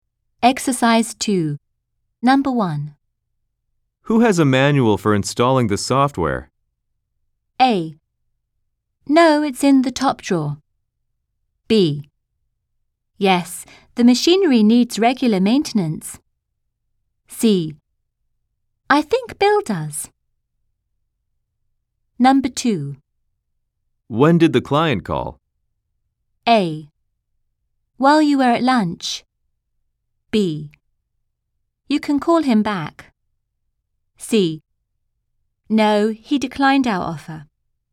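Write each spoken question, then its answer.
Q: Who has a manual for installing the software?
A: C: I think Bill does.

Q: When did the client call?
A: A: While you were at lunch.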